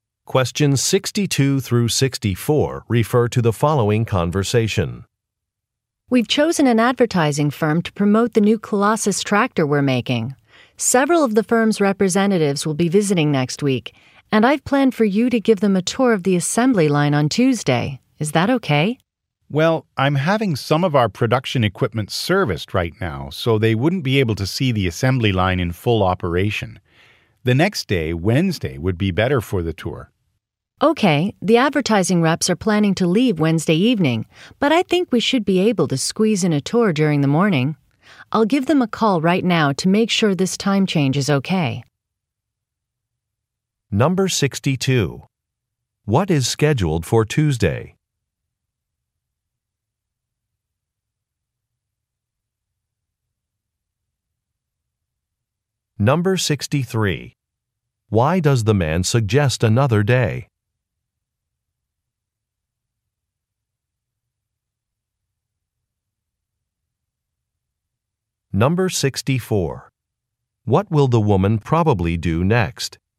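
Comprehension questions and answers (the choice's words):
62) What is scheduled for Tuesday?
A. A tour of the facilities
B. A luncheon with retirees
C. A safety inspection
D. An equipment purchase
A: A tour of the facilities

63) Why does the man suggest another day?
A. So that a complete process can be observed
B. So that there are enough workers available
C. So that production is not disrupted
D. So that a deadline can be met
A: So that a complete process can be observed

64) What will the woman probably do next?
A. Apply for an extended warranty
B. Ask about changing some plans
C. Pick up some clients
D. Watch a training video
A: Ask about changing some plans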